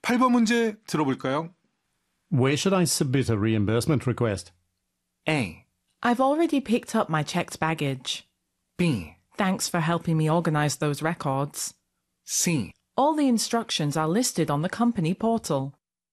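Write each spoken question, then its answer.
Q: Where should I submit a reimbursement request?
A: C: All the instructions are listed on the company portal.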